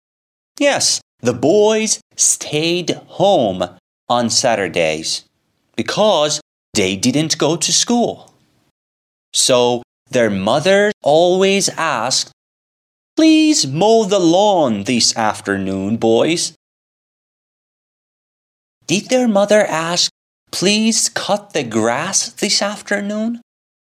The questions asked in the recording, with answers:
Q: Did their mother ask, "Please cut the grass this afternoon?"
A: Yes, she asked the boys to cut the grass.